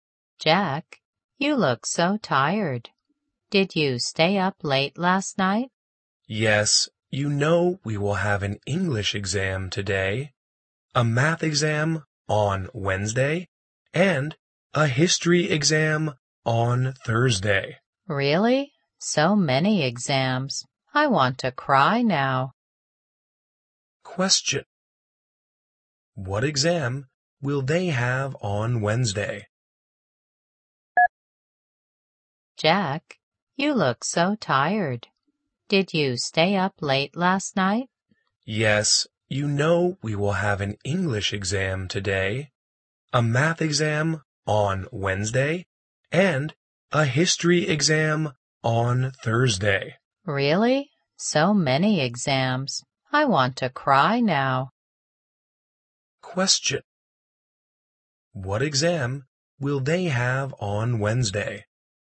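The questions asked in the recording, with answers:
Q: What exam will they have on Wednesday?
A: A math exam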